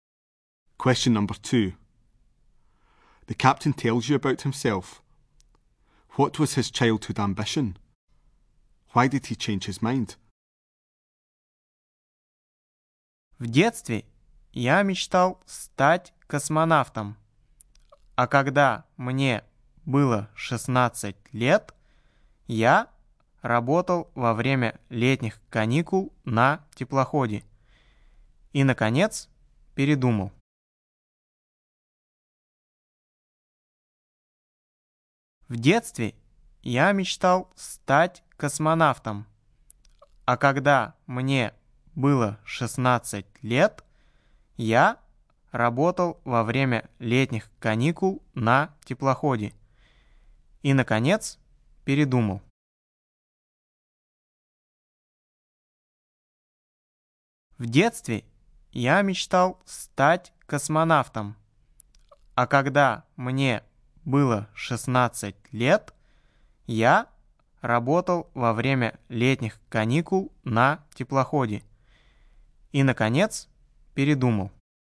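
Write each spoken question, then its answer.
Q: What was his childhood ambition?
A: To become a cosmonaut

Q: Why did he change his mind?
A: At 16 he worked on a ship during the summer holidays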